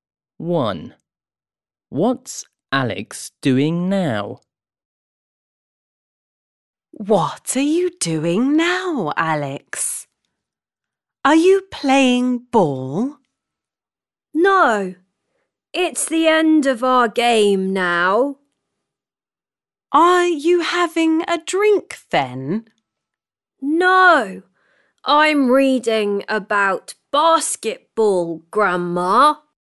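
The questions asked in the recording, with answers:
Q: What's Alex doing now?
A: reading about basketball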